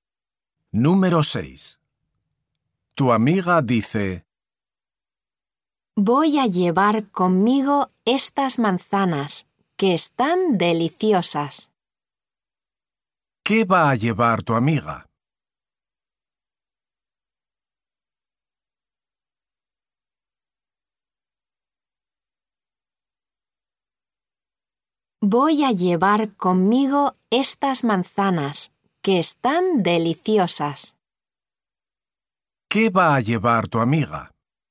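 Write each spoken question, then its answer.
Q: ¿Qué va a llevar tu amiga?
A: manzanas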